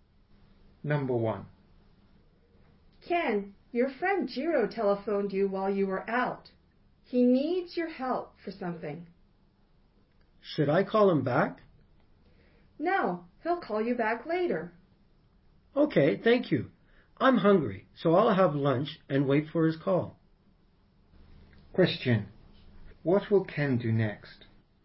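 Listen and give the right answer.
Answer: He will have lunch and wait for Jiro's call.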